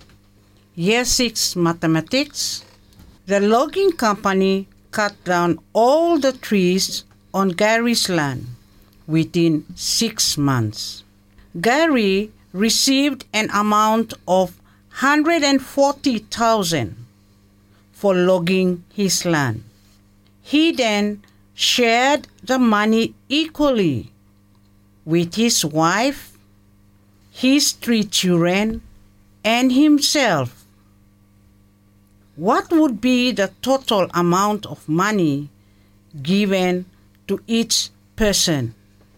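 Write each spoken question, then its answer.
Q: What would be the total amount of money given to each person?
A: $28,000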